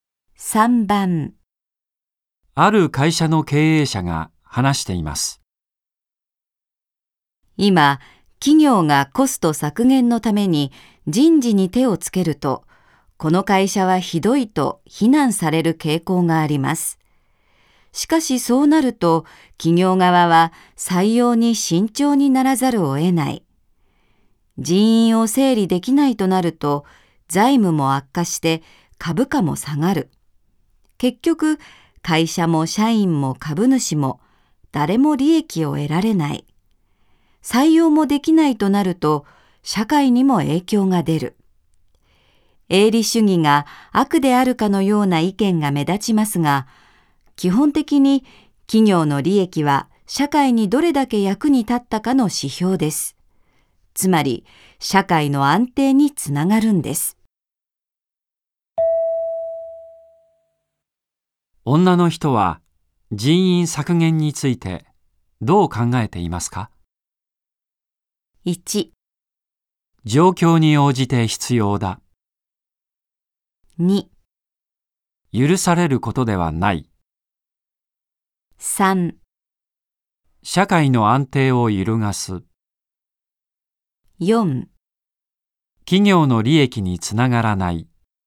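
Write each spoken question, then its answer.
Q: 女の人は人員削減についてどう考えていますか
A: 1: 状況に応じて必要だ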